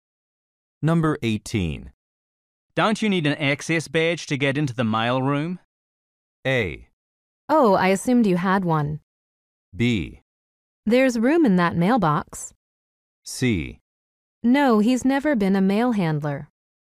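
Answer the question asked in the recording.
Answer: A: Oh, I assumed you had one.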